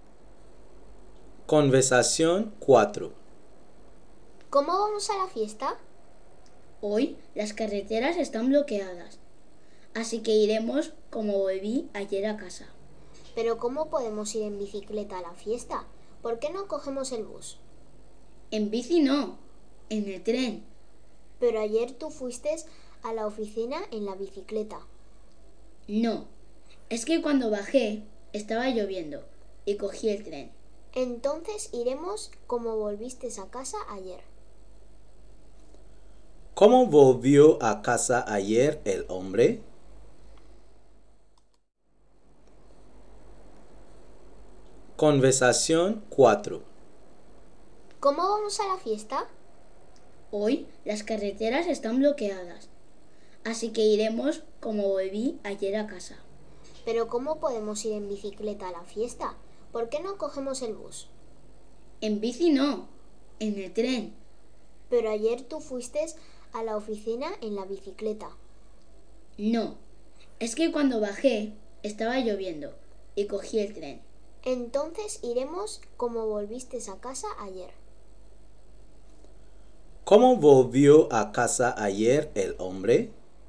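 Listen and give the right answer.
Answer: En tren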